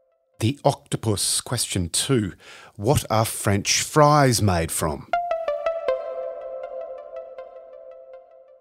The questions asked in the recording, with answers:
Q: What are French fries made from?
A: Potatoes.